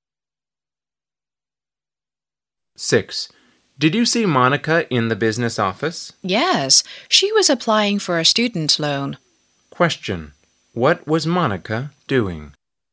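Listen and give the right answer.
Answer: Applying for a student loan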